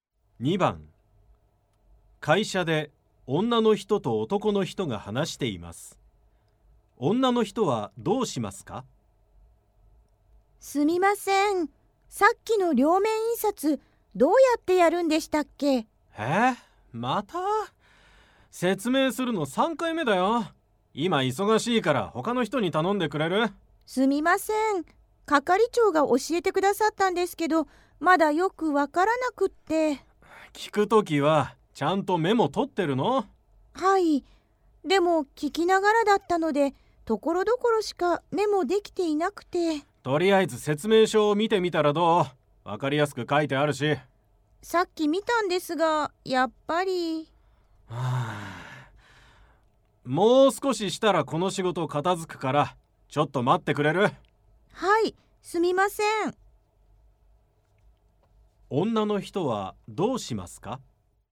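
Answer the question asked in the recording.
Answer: 男の人の仕事が片付くまで少し待つ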